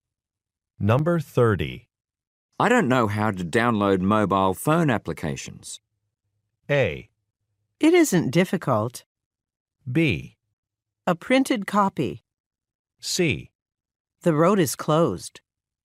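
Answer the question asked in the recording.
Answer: A: It isn't difficult.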